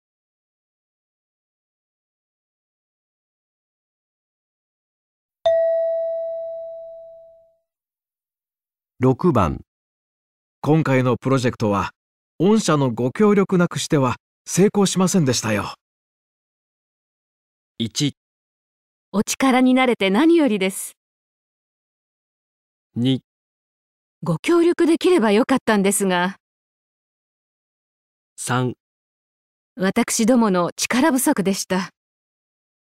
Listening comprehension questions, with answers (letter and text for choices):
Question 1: 今回のプロジェクトは御社のご協力無くしては成功しませんでしたよ。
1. お力になれて何よりです。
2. ご協力できればよかったんですが。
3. 私どもの力不足でした。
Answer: 1. お力になれて何よりです。

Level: 【N1 第1回】聴解